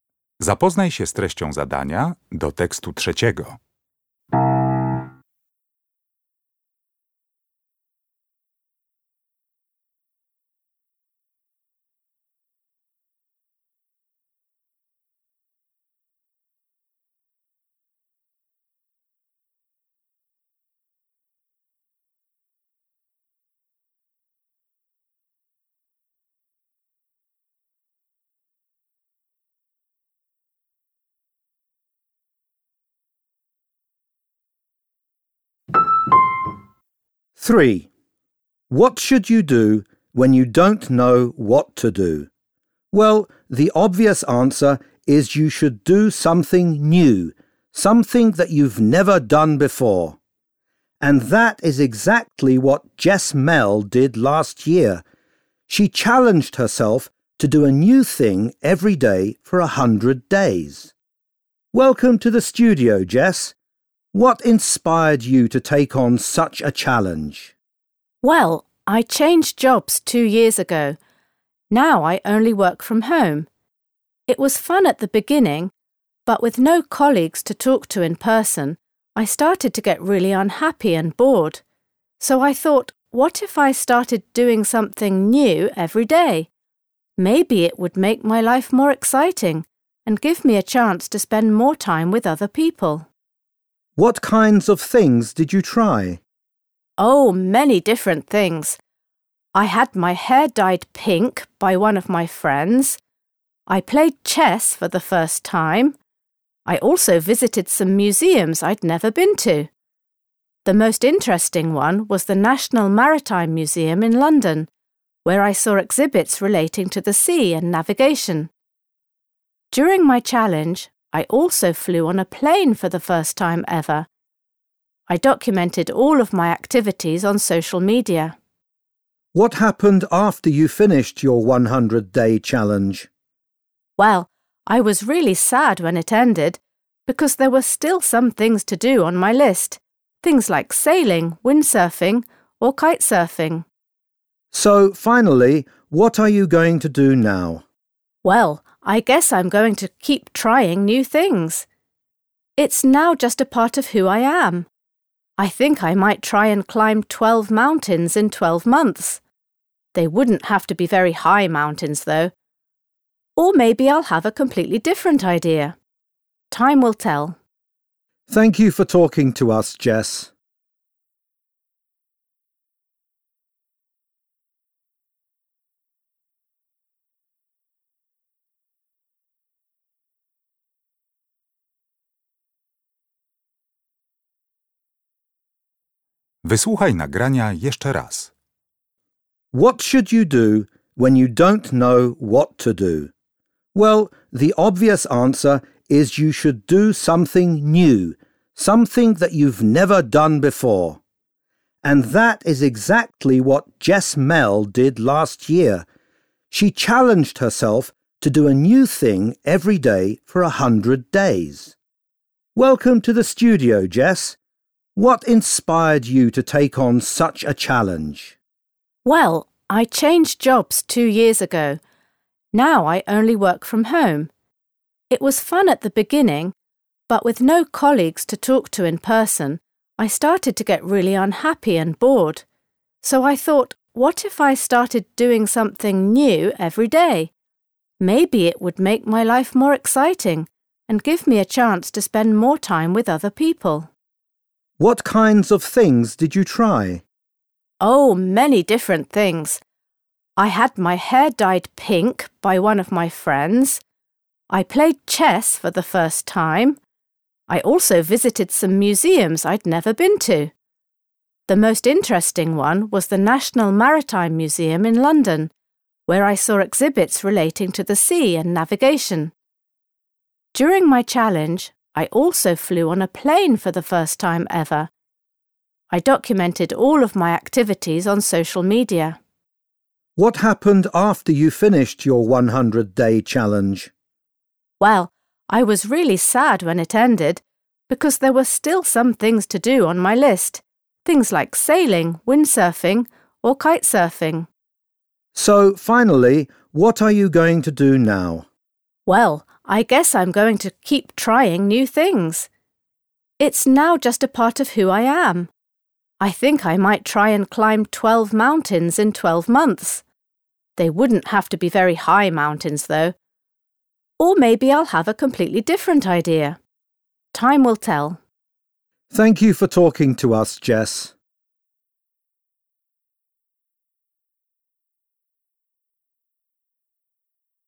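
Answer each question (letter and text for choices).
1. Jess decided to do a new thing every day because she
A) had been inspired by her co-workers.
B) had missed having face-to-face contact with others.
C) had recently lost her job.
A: B) had missed having face-to-face contact with others.

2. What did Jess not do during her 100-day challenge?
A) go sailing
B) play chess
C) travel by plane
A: A) go sailing

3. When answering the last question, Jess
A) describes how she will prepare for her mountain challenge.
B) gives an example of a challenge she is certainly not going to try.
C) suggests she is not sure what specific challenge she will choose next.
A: C) suggests she is not sure what specific challenge she will choose next.

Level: poziom podstawowy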